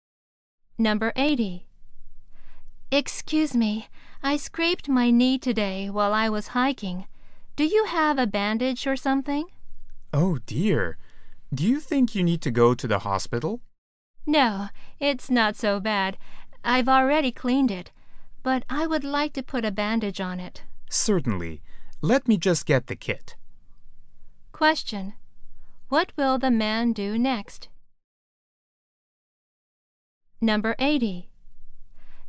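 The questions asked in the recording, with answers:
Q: What will the man do next?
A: Get the first-aid kit for a bandage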